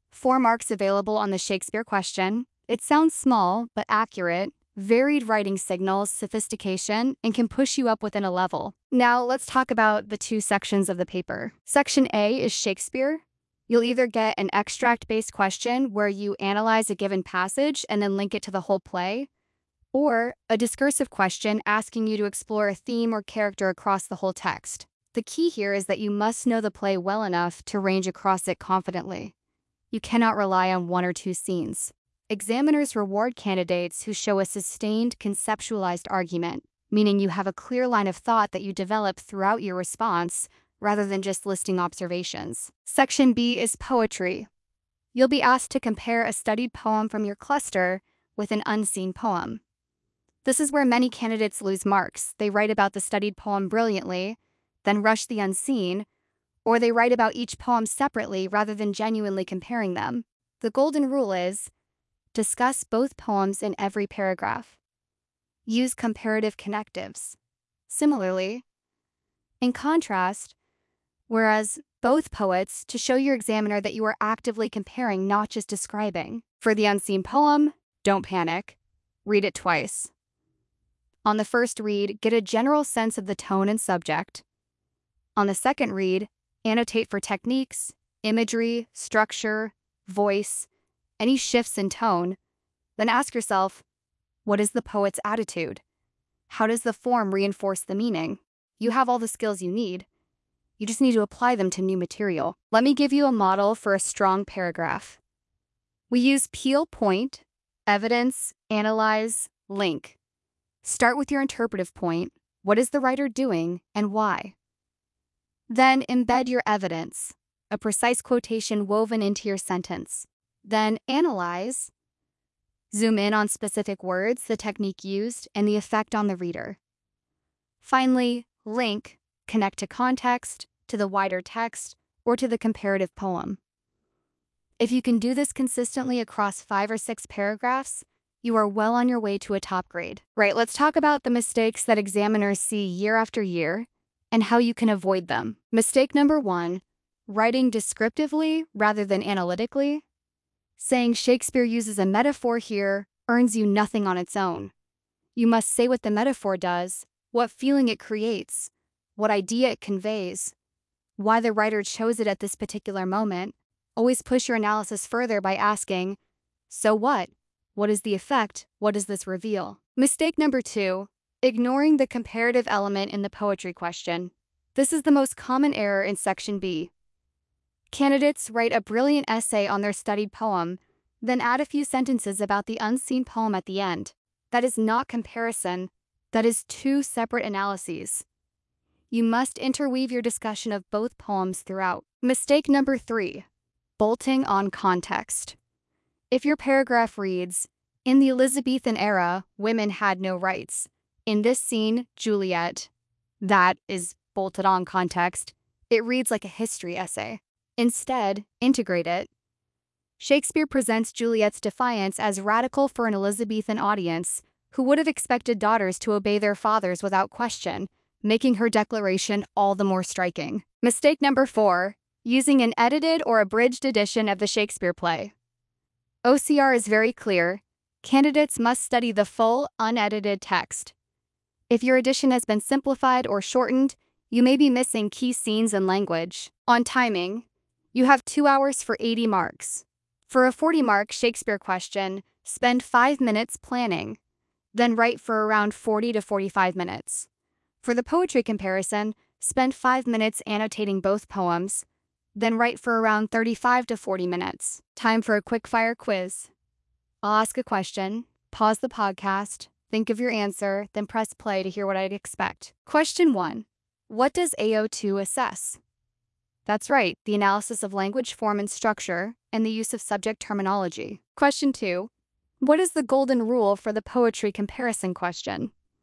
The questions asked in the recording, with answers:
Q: Question two, what is the golden rule for the poetry comparison question?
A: Correct, discuss both poems in every paragraph.